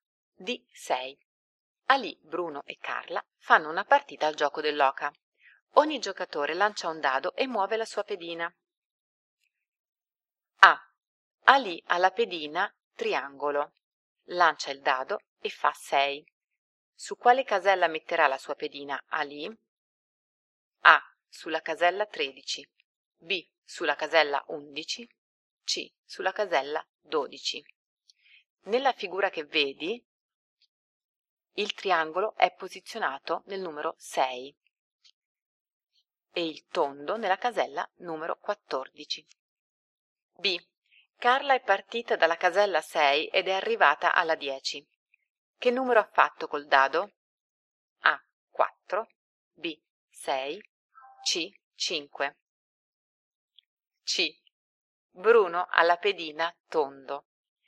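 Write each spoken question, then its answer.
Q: Su quale casella metterà la sua pedina Ali?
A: C: Sulla casella 12

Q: Che numero ha fatto col dado?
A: A: 4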